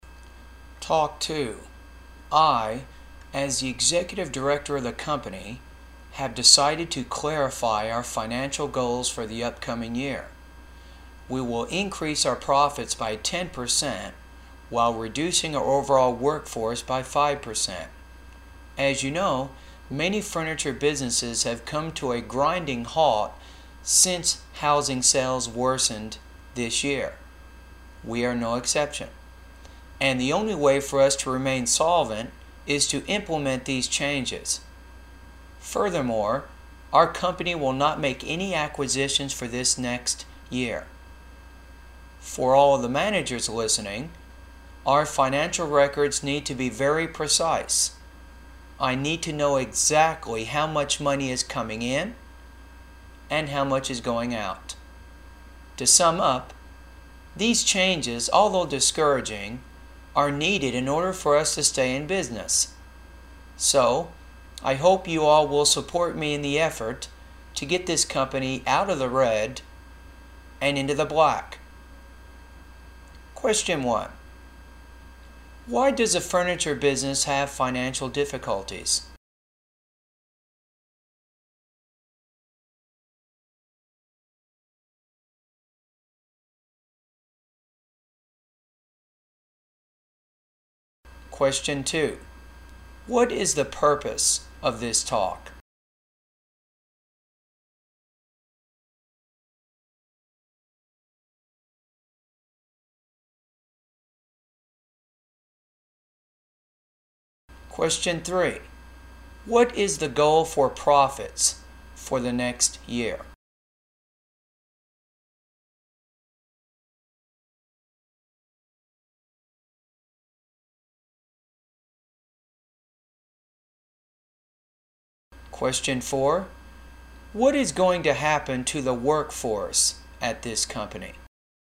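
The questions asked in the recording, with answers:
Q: Why does a furniture business have financial difficulties?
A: Housing sales worsened this year

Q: What is the purpose of this talk?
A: To clarify the company's financial goals for the upcoming year

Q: What is the goal for profits for the next year?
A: Increase profits by 10%

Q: What is going to happen to the workforce at this company?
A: It will be reduced by 5%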